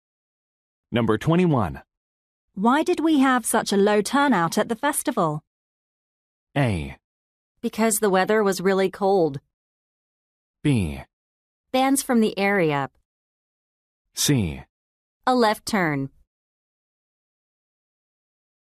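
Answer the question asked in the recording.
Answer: A: Because the weather was really cold.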